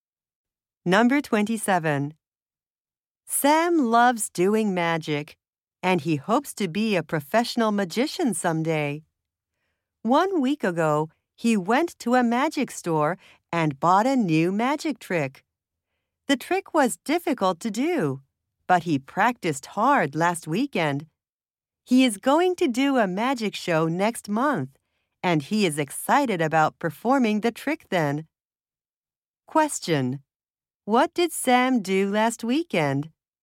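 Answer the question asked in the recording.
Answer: He practiced a new magic trick.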